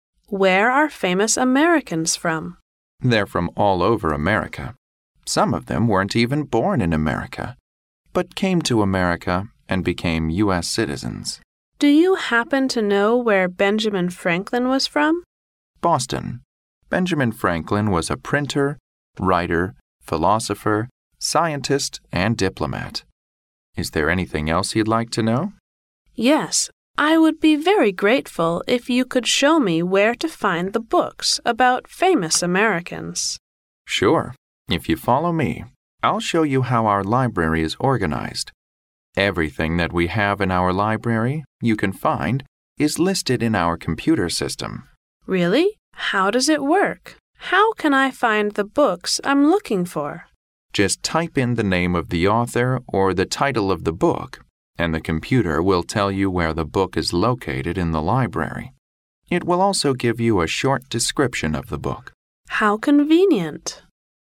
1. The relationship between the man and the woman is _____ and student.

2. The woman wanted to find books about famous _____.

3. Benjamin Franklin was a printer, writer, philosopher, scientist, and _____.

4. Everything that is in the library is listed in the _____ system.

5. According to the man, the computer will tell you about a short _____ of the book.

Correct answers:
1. librarian
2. Americans
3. diplomat
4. computer
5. description

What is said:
W: Where are famous Americans from?
M: They're from all over America. Some of them weren't even born in America, but came to America and became U.S. citizens.
W: Do you happen to know where Benjamin Franklin was from?
M: Boston. Benjamin Franklin was a printer, writer, philosopher, scientist, and diplomat! Is there anything else you'd like to know?
W: Yes. I would be very grateful if you could show me where to find the books about famous Americans.
M: Sure. If you follow me, I'll show you how our library is organised. Everything that we have in our library you can find is listed in our computer system.
W: Really? How does it work? How can I find the books I'm looking for?
M: Just type in the name of the author or the title of the book and the computer will tell you where the book is located in the library. It will also give you a short description of the book.
W: How convenient!